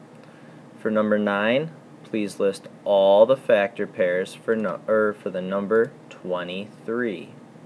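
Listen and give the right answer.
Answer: 1 and 23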